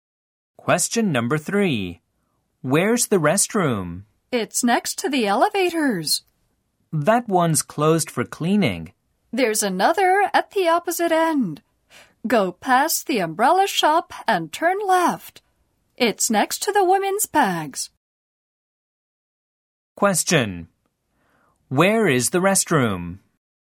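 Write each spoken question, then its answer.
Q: Where is the restroom?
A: At the opposite end, next to the women's bags (past the umbrella shop, turn left)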